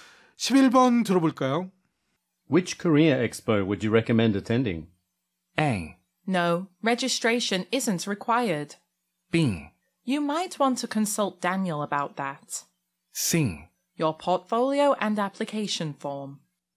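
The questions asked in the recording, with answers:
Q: Which career expo would you recommend attending?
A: B: You might want to consult Daniel about that.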